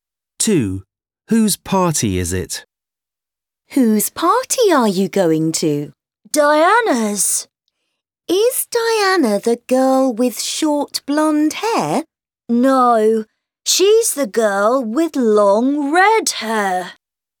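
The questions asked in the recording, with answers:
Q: Whose party is it?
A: Diana's, the girl with long red hair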